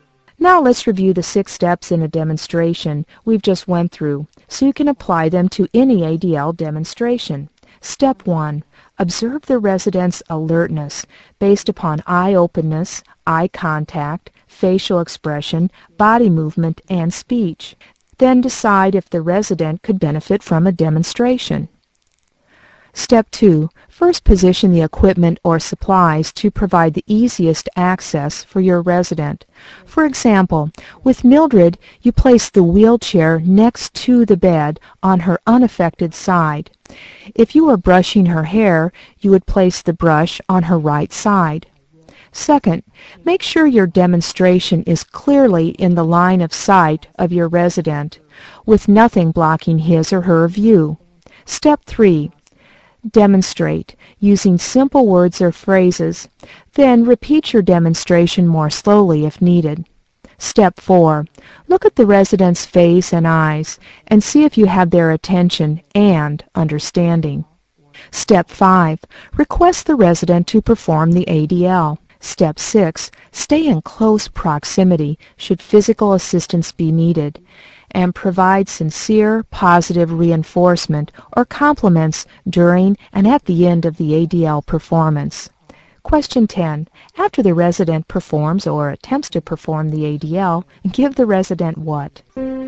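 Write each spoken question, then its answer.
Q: After the resident performs or attempts to perform the ADL, give the resident what?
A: Sincere positive reinforcement or compliments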